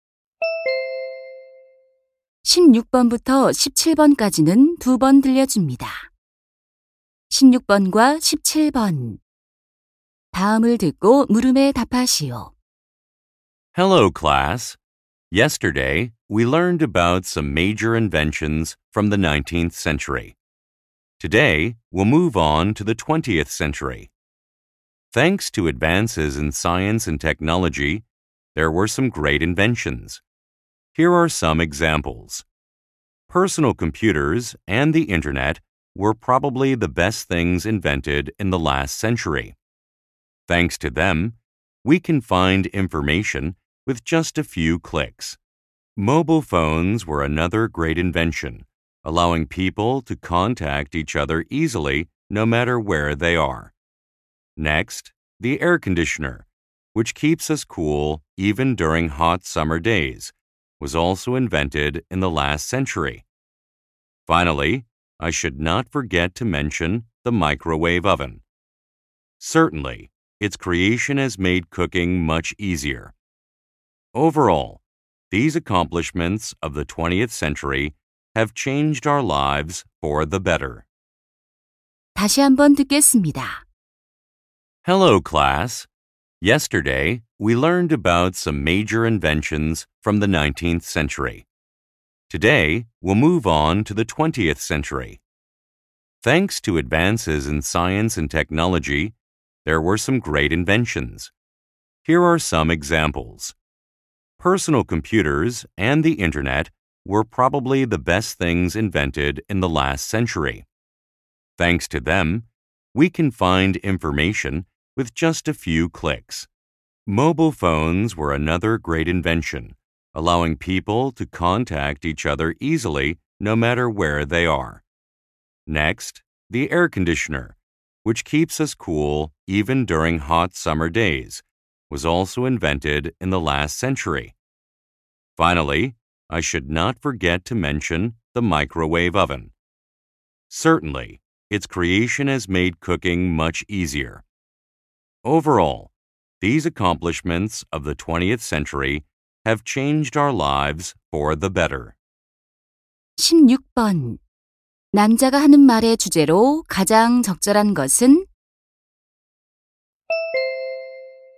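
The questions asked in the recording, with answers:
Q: 남자가 하는 말의 주제로 가장 적절한 것은?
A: 우리의 삶을 바꾼 20세기의 주요 발명품들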